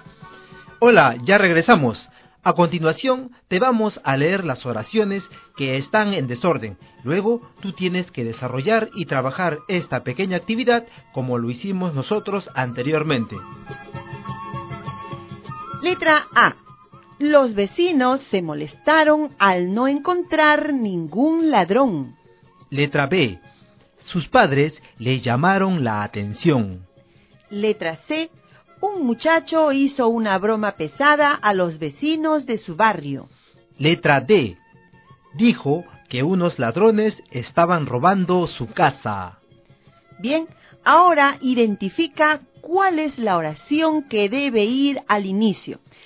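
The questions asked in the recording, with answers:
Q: Bien, ahora identifica cuál es la oración que debe ir al inicio.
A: C: Un muchacho hizo una broma pesada a los vecinos de su barrio.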